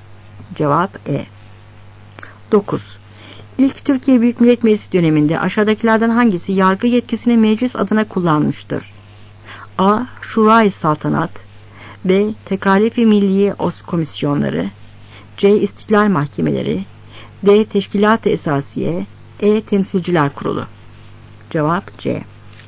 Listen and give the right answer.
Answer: Cevap C.